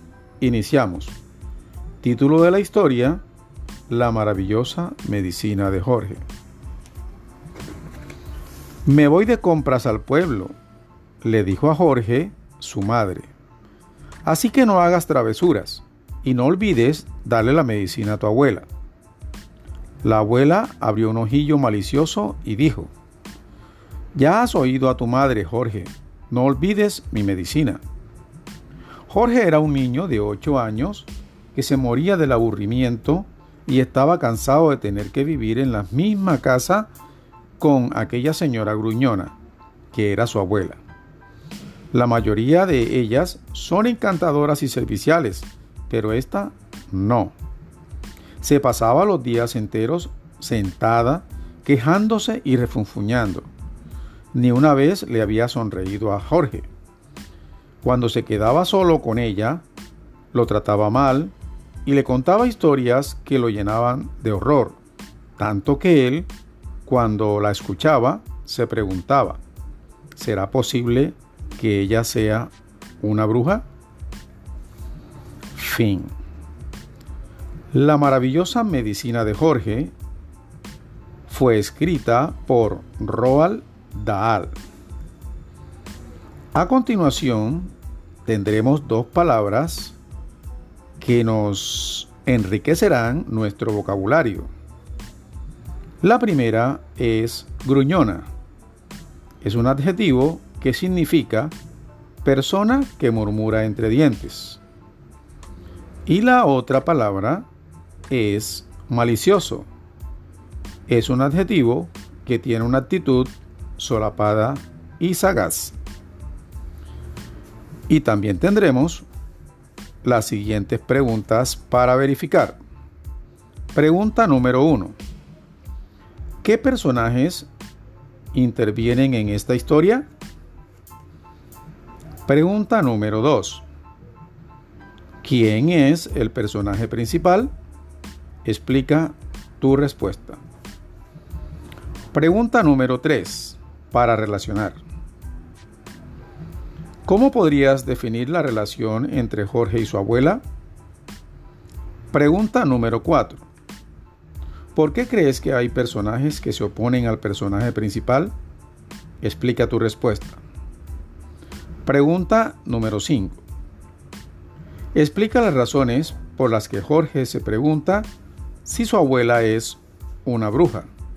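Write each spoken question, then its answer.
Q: ¿Qué personajes intervienen en esta historia?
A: Jorge, su madre y su abuela

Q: ¿Quién es el personaje principal?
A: Jorge

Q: Explica las razones por las que Jorge se pregunta si su abuela es una bruja.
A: Porque lo trataba mal y le contaba historias que lo llenaban de horror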